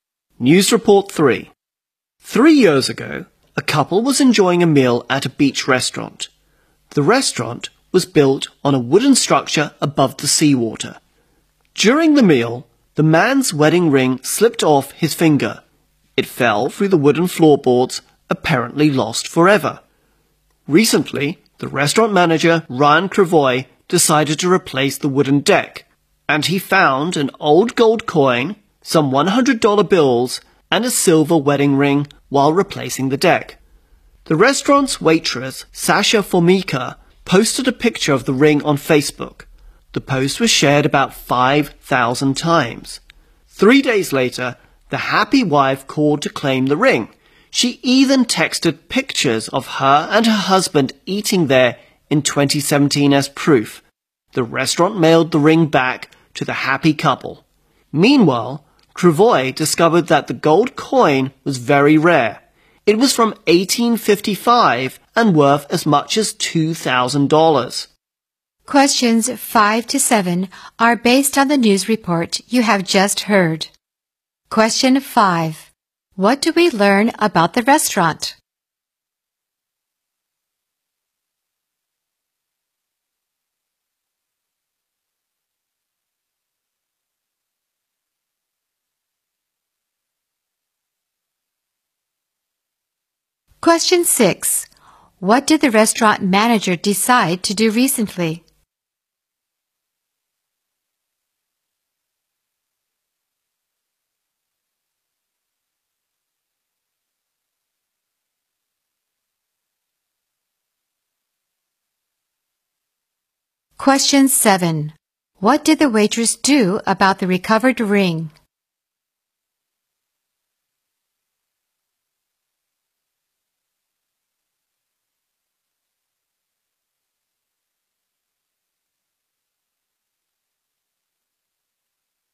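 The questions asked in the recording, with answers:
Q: What do we learn about the restaurant?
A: It was built on a wooden structure above the seawater

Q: What did the restaurant manager decide to do recently?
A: Replace the wooden deck

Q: What did the waitress do about the recovered ring?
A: She posted a picture of it on Facebook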